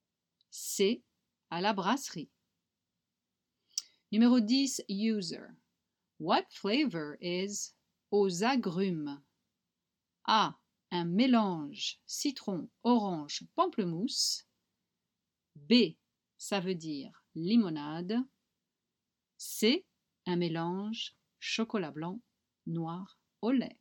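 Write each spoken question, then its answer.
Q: What flavor is aux agrumes?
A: A: Un mélange citron, orange, pamplemousse.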